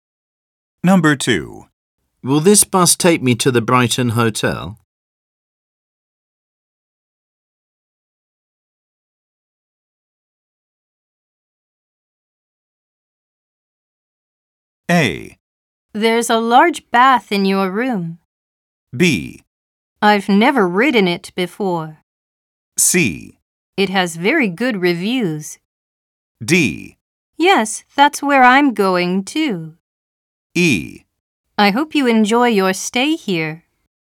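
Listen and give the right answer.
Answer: D: Yes, that's where I'm going too.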